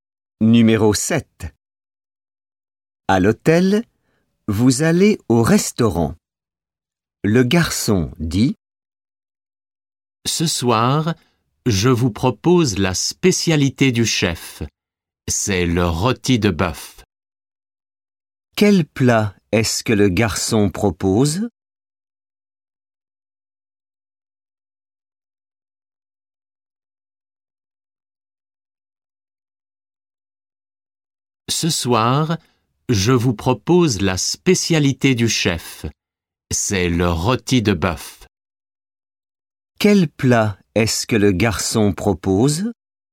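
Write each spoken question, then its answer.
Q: Quel plat est-ce que le garçon propose?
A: Le rôti de bœuf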